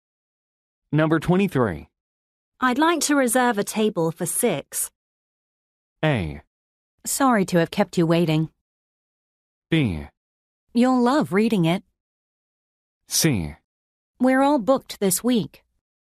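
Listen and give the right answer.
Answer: C: We're all booked this week.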